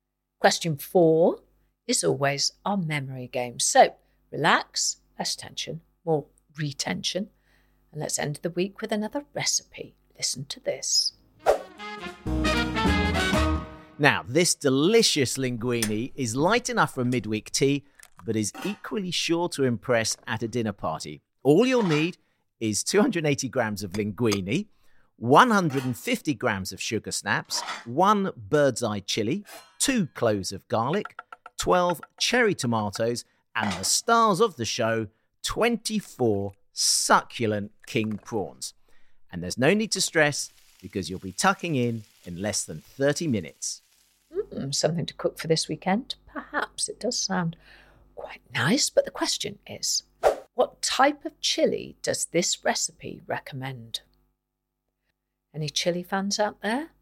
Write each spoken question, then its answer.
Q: what type of chili does this recipe recommend?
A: And the answer I was looking for was bird's eye chilli.